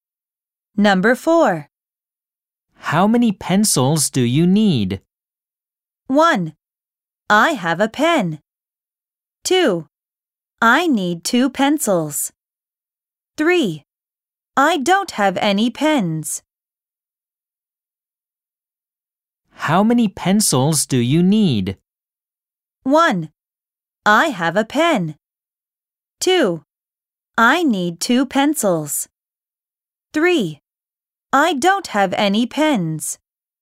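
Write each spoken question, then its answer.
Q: How many pencils do you need?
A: 2: I need 2 pencils.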